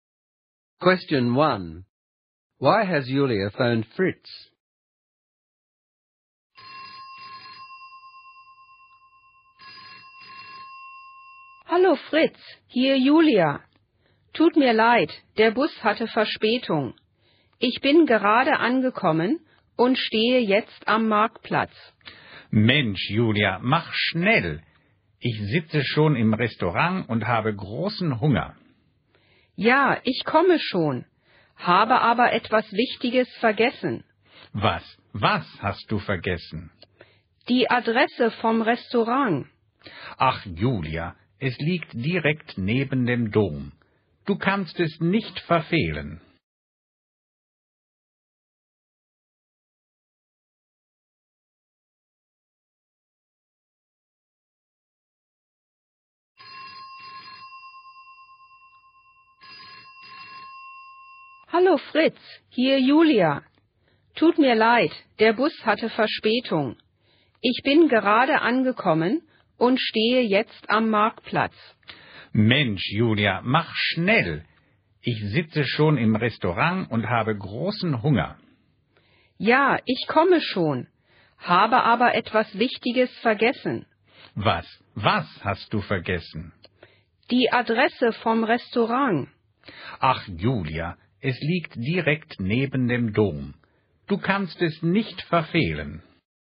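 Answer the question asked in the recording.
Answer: She has forgotten the restaurant's address (she's just arrived late at the market square).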